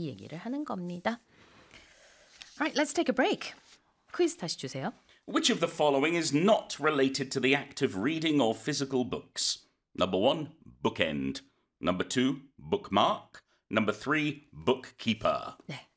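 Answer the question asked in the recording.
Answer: 3: bookkeeper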